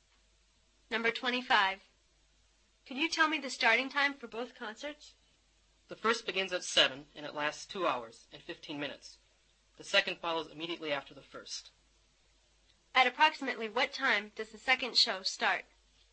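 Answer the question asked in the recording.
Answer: 9:15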